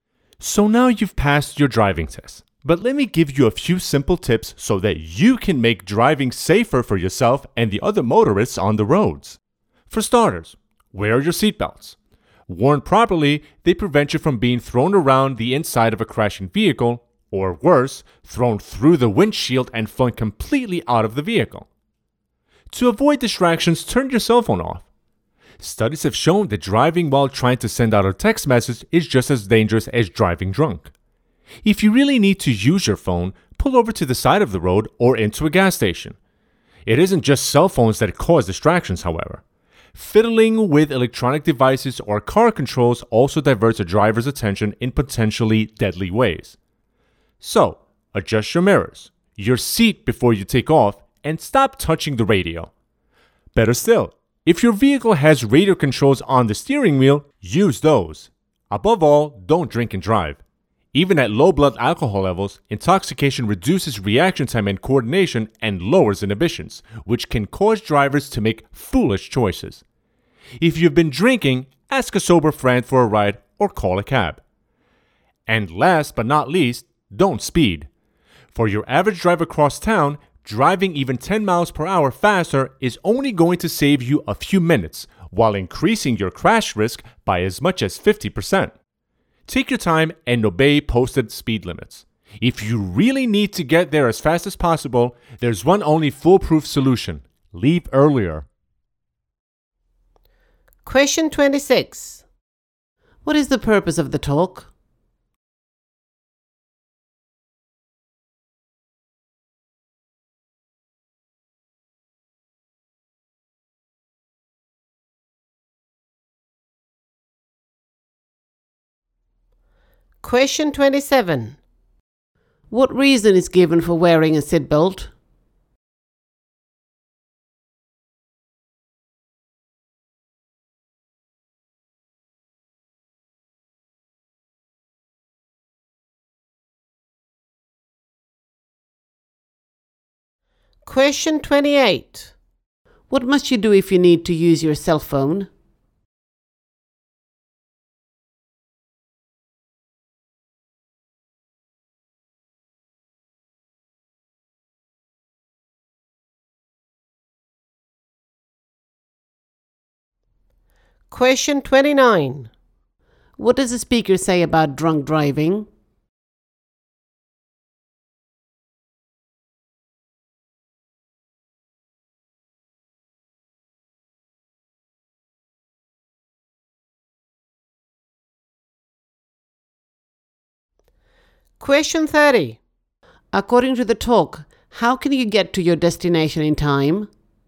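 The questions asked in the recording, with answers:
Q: What is the purpose of the talk?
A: To give tips for driving safely

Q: What reason is given for wearing a seatbelt?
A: It stops you being thrown around inside the vehicle or out through the windshield in a crash

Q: What must you do if you need to use your cell phone?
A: Pull over to the side of the road or into a gas station

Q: According to the talk, how can you get to your destination in time?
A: Leave earlier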